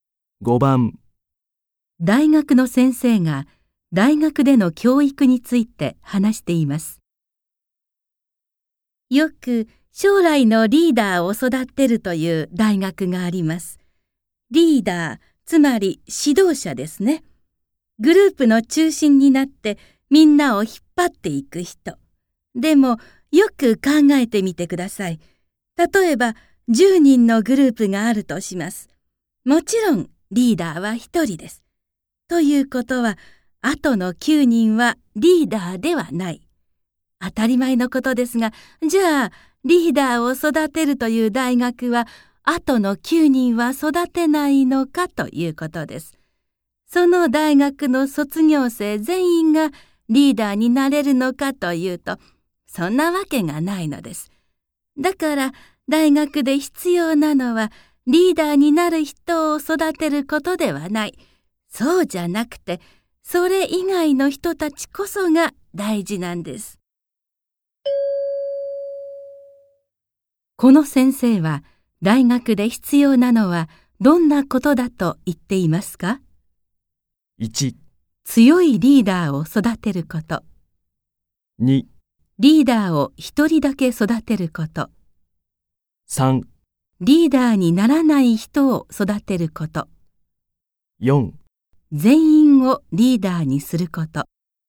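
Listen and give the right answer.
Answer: 3: リーダーにならない人を育てること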